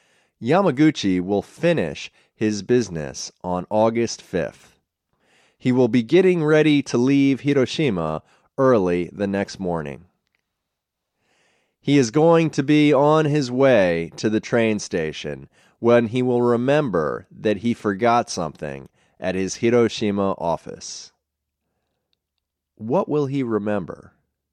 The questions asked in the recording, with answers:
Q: What will he remember?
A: He will remember that he forgot something at his Hiroshima office.